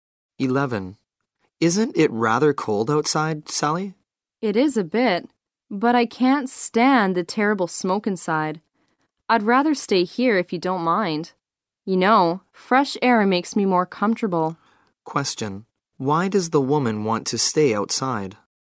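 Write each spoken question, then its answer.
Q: Why does the woman want to stay outside?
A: She can't stand the terrible smoke inside and prefers fresh air.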